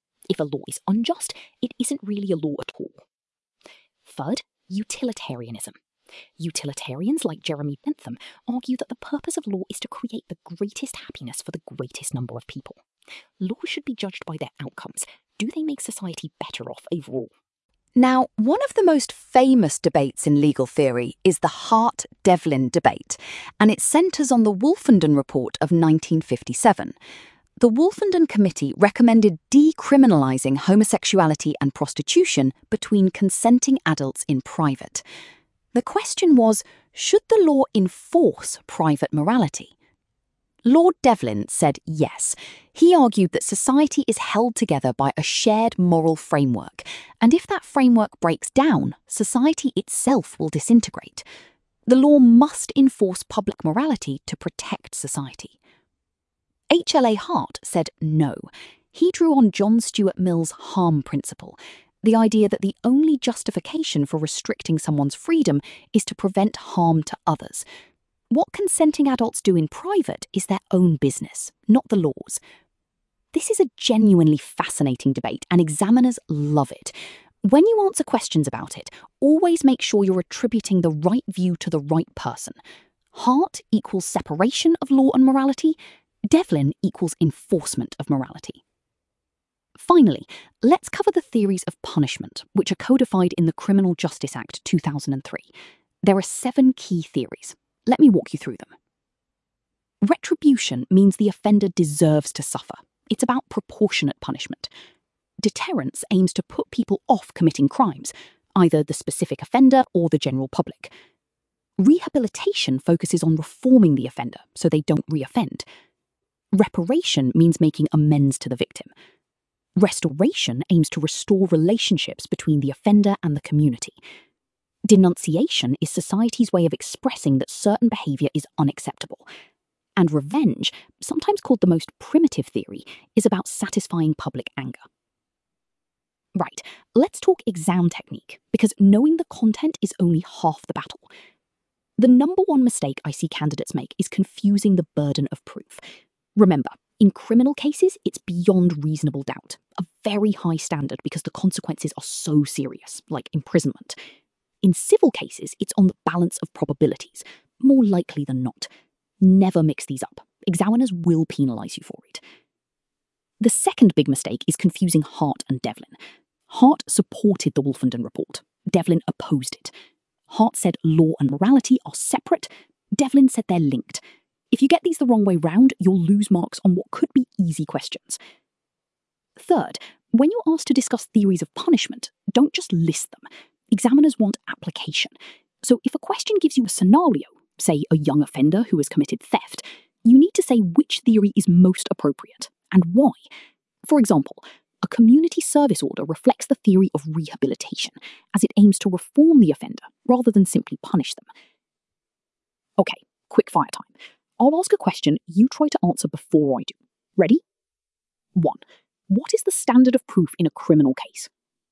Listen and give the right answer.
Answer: Beyond reasonable doubt.